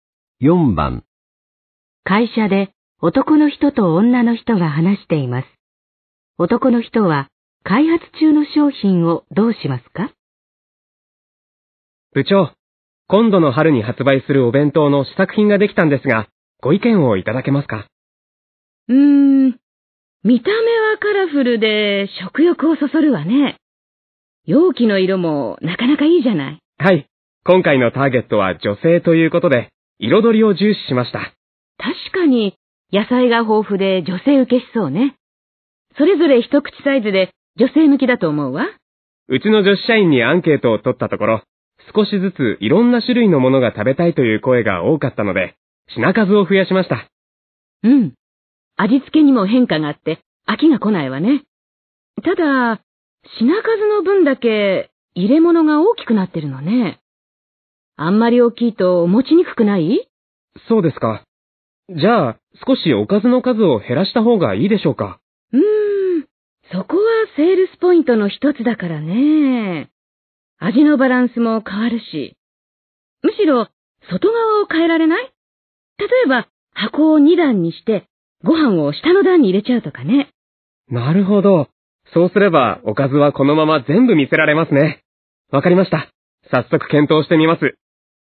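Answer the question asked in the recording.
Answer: 箱を2段にしてご飯を下の段に入れる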